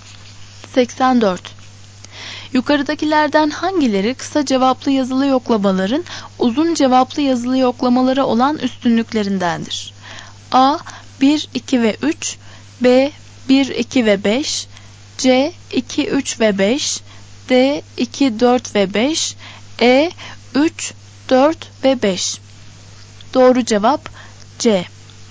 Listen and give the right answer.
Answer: Doğru cevap C.